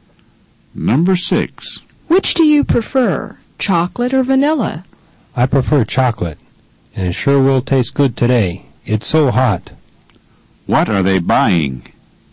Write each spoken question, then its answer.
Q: What are they buying?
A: They're buying ice cream.